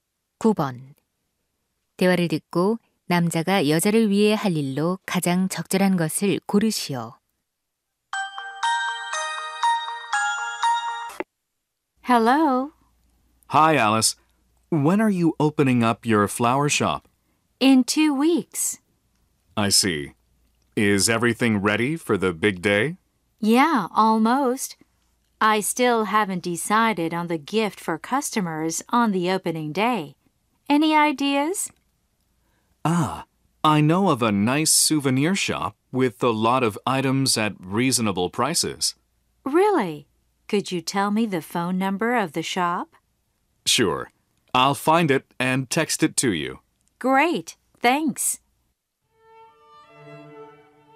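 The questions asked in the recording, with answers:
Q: 대화를 듣고 남자가 여자를 위해 할 일로 가장 적절한 것을 고르시오.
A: 기념품 가게 전화번호를 문자로 보내기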